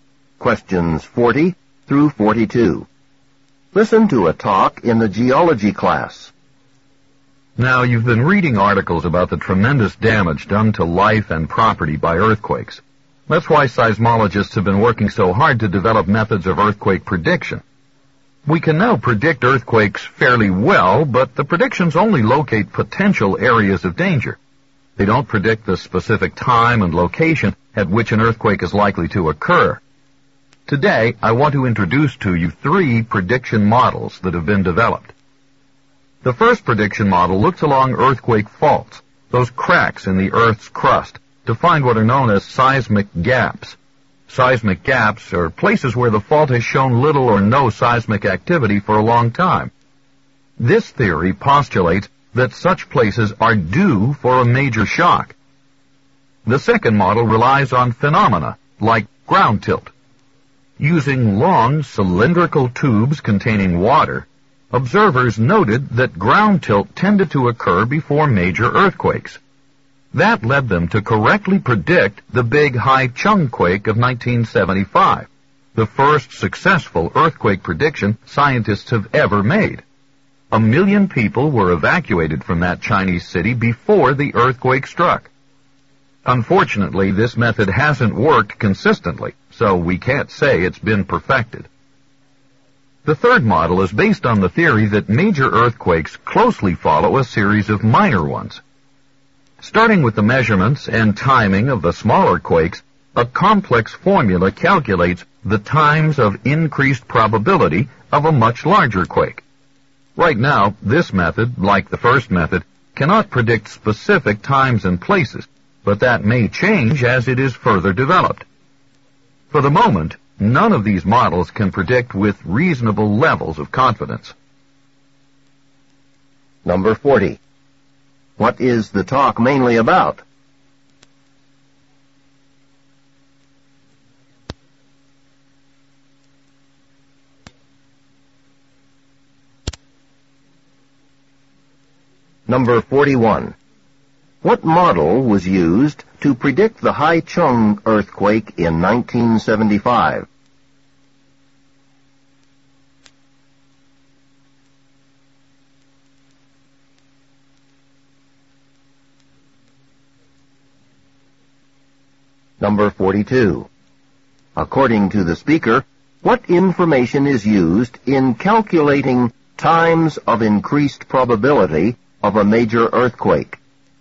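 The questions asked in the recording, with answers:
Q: What is the talk mainly about?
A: Models for predicting earthquakes

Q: What model was used to predict the Haichung earthquake in 1975?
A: The ground tilt model

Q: According to the speaker, what information is used in calculating times of increased probability of a major earthquake?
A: The measurements and timing of smaller quakes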